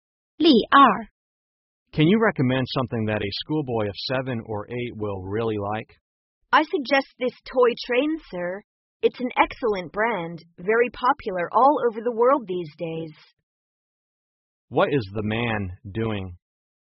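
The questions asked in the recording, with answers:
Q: What is the man doing?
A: Buying a toy for a schoolboy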